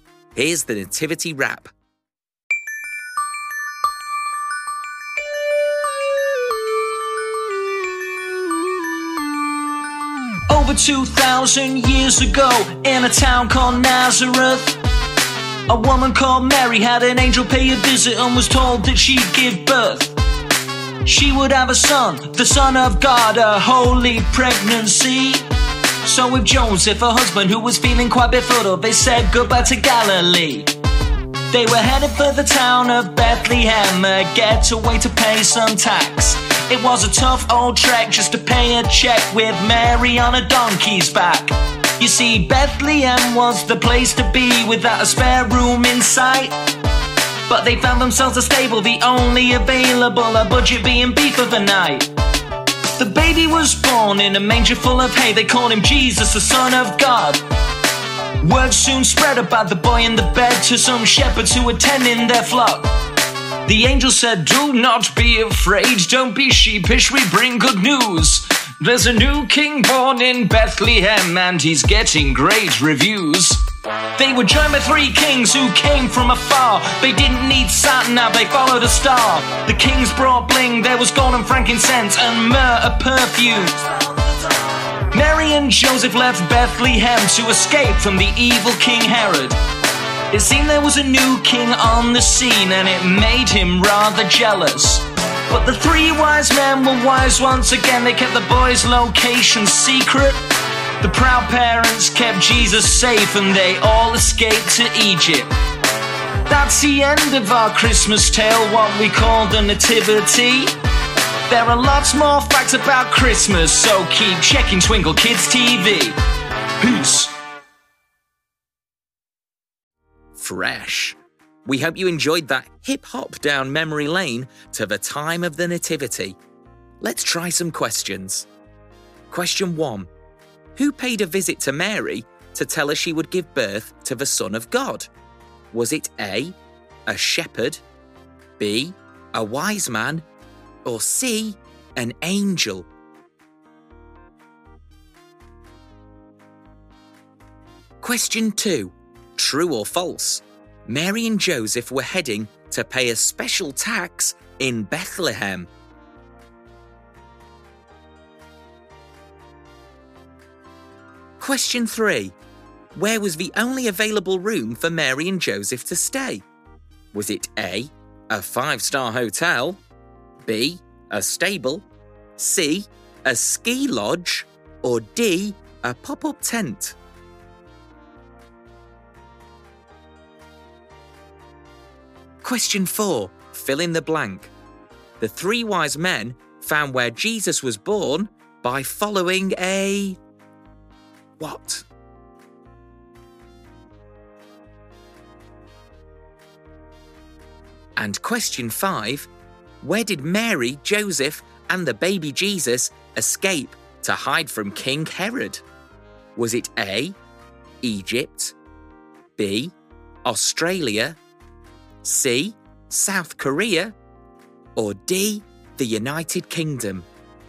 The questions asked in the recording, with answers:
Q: Who paid a visit to Mary to tell her she would give birth to the Son of God?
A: The answer is C, an angel.

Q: True or false? Mary and Joseph were heading to pay a special tax in Bethlehem.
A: The answer is true.

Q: Where was the only available room for Mary and Joseph to stay?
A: so that leaves A, a stable.

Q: The three wise men found where Jesus was born by following a... what?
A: The three wise men found where Jesus was born by following a star.

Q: where did Mary, Joseph, and the baby Jesus escape to hide from King Herod?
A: And the answer is A, Egypt.